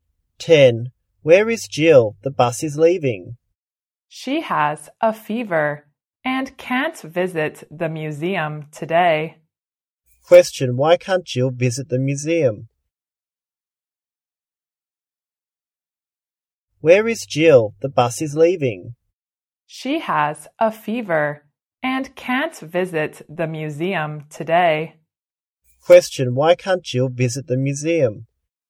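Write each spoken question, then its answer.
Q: Why can't Jill visit the museum?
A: She has a fever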